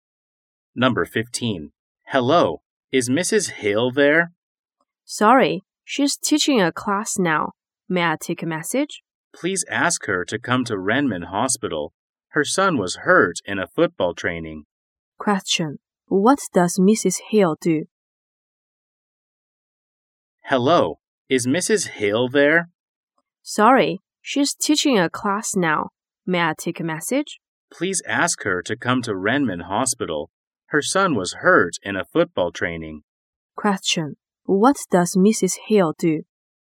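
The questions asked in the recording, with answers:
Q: What does Mrs. Hill do?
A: She is a teacher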